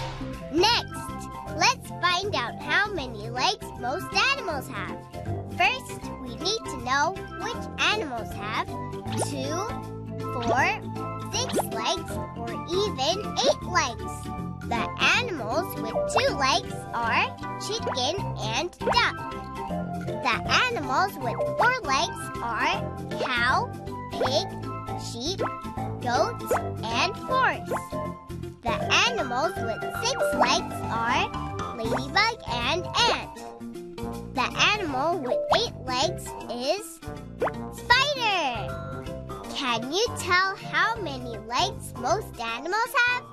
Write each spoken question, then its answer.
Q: Can you tell how many legs most animals have?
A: That's right, it's 4 legs.